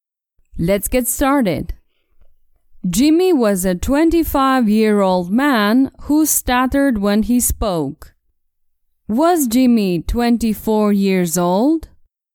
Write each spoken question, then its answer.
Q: Was Jimmy 24 years old?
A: No, he was a 25-year-old man.